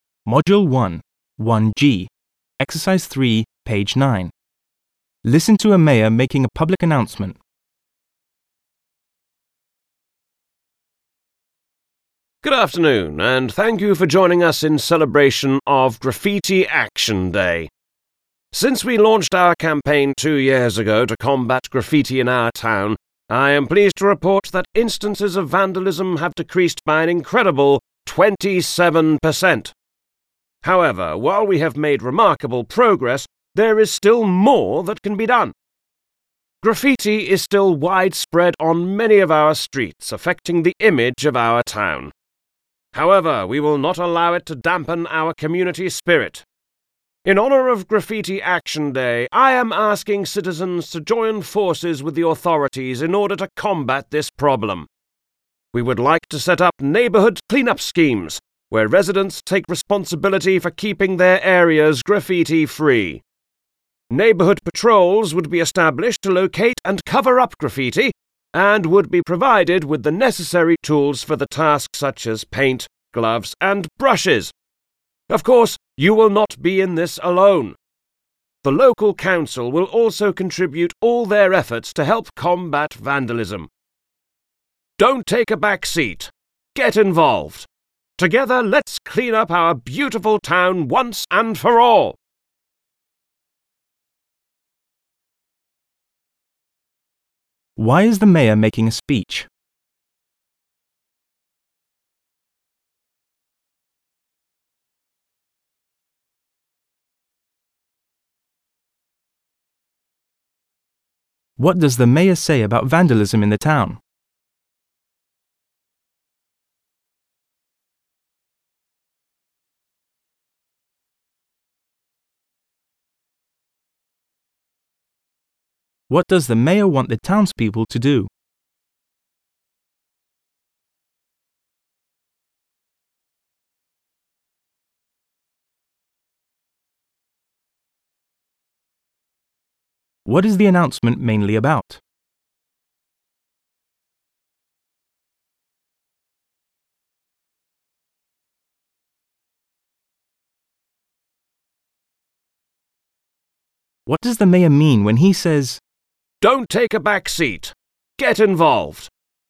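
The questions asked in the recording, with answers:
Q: Why is the mayor making a speech?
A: To mark Graffiti Action Day and ask citizens to help fight graffiti

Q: What does the mayor say about vandalism in the town?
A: It has decreased by 27% in two years, but graffiti is still widespread

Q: What does the mayor want the townspeople to do?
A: Join neighbourhood clean-up schemes and patrols to cover up graffiti

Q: What is the announcement mainly about?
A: A community campaign against graffiti

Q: What does the mayor mean when he says,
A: People should take an active part instead of leaving it to others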